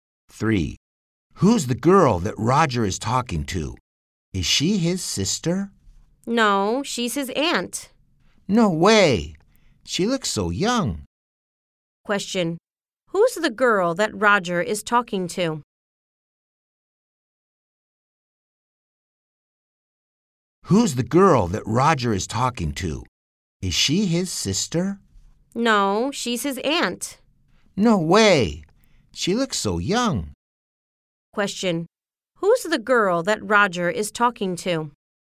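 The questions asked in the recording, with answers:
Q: Who's the girl that Roger is talking to?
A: His aunt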